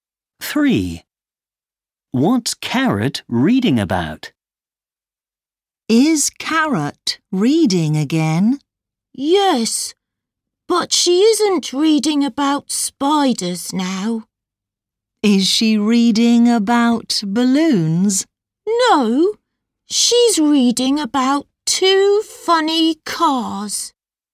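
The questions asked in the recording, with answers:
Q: What's Carrot reading about?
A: Two funny cars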